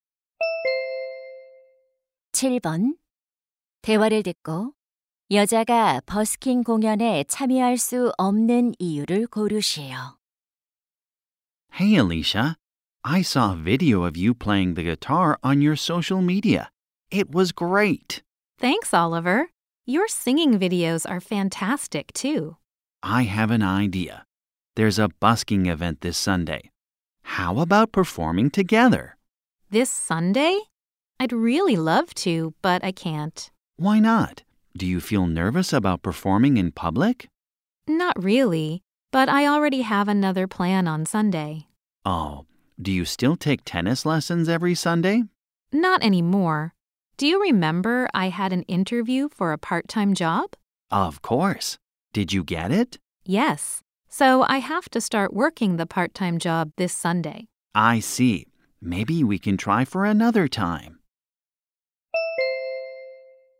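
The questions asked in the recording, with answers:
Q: 대화를 듣고 여자가 버스킹 공연에 참여할 수 없는 이유를 고르시오.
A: 아르바이트를 시작해야 해서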